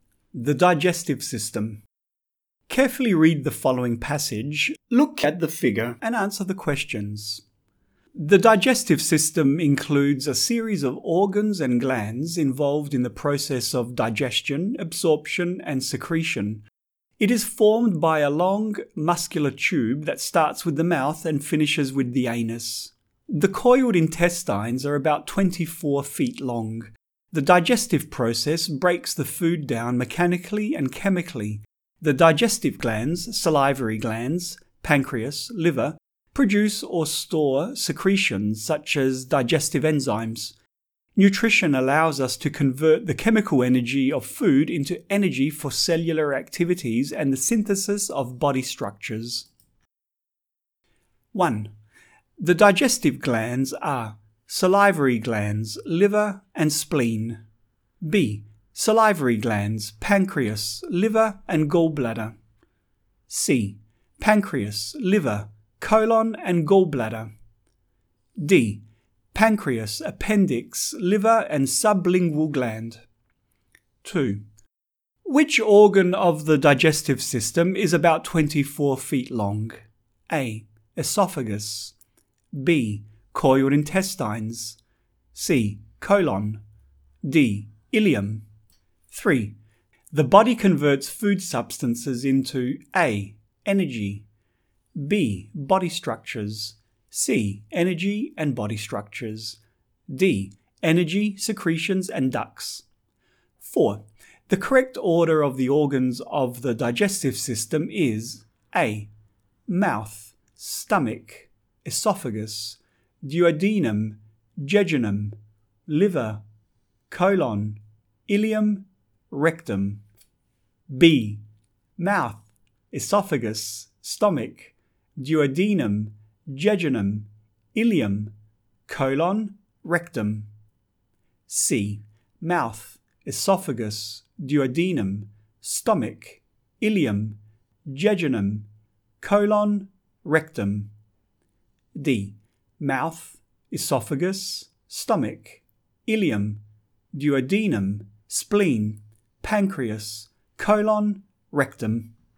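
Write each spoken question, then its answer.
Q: Which organ of the digestive system is about 24 feet long?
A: B: Coiled intestines.

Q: The body converts food substances into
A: C: Energy and body structures.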